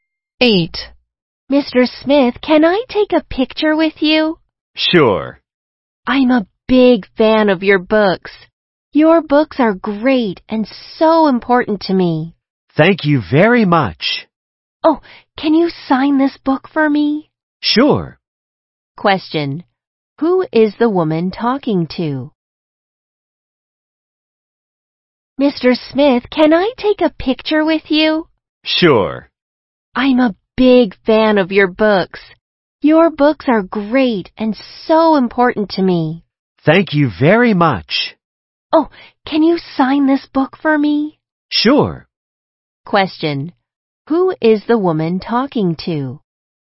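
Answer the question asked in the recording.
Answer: Mr. Smith, a writer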